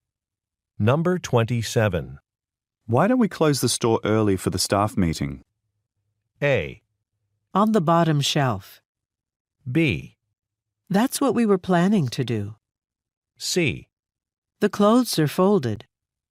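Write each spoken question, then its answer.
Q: Why don't we close the store early for the staff meeting?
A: B: That's what we were planning to do.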